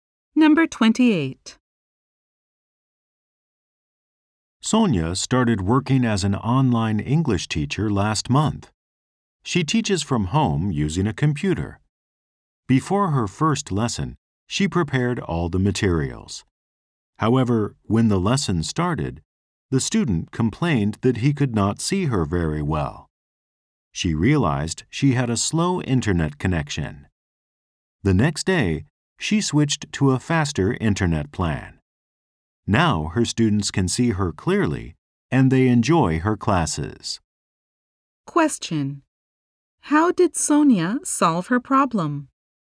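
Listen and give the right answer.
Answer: She switched to a faster internet plan.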